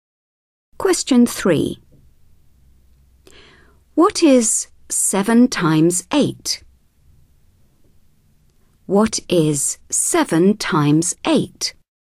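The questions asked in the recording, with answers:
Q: What is 7 times 8?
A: 56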